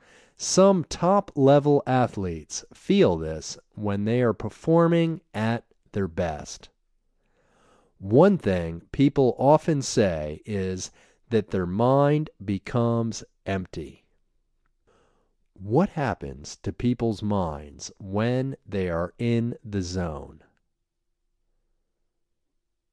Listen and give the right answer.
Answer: People often say that their mind becomes empty.